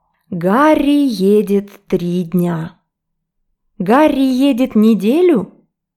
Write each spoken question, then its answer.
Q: Гарри едет неделю?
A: Нет, он едет 3 дня.